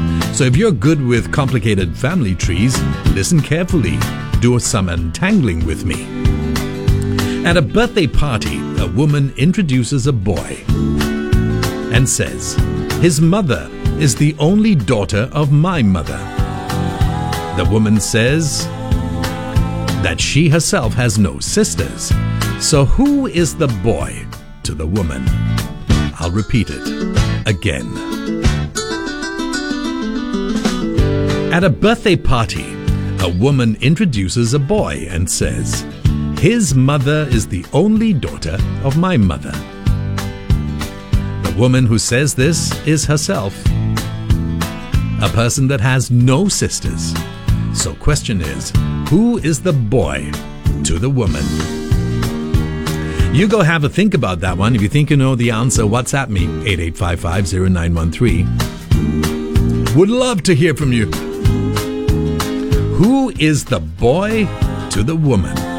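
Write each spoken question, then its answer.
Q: So who is the boy to the woman?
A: Her son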